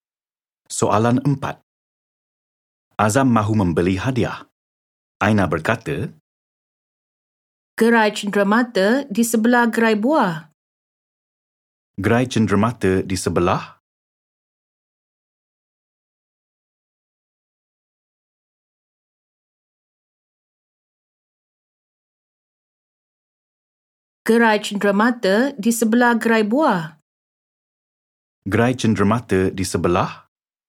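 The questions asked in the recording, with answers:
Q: Gerai cenderamata di sebelah?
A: Gerai buah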